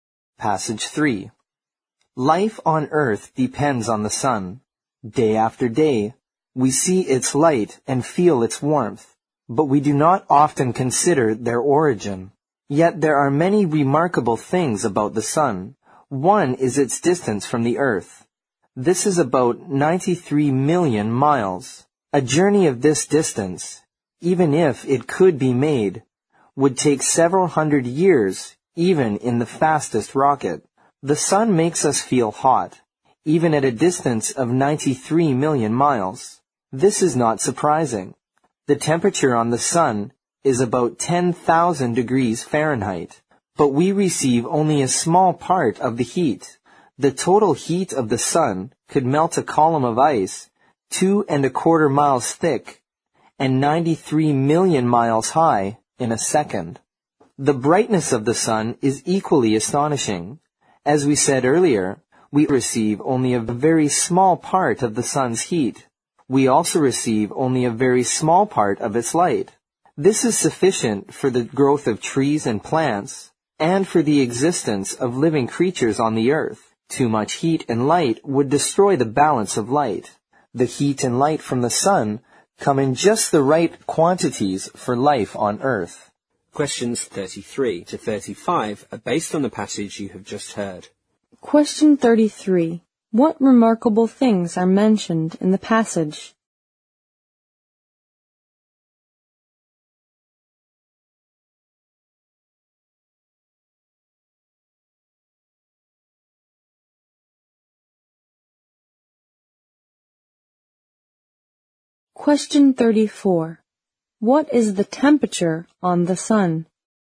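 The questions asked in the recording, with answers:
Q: What remarkable things are mentioned in the passage?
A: The sun's distance from the earth, its heat and its brightness

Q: What is the temperature on the sun?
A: About 10,000 degrees Fahrenheit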